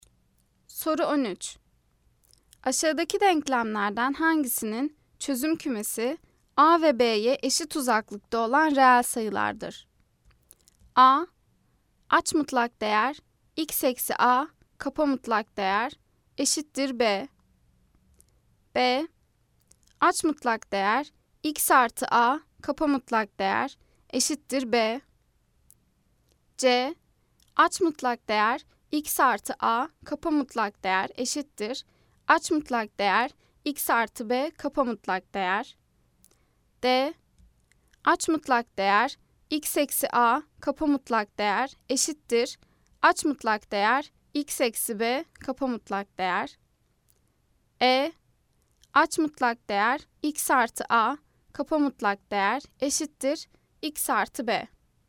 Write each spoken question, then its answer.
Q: Aşağıdaki denklemlerden hangisinin çözüm kümesi A ve B'ye eşit uzaklıkta olan reel sayılardır?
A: Cevap Denizli. Aç mutlak değer x eksi A kapa mutlak değer eşittir aç mutlak değer x eksi b kapa mutlak değer.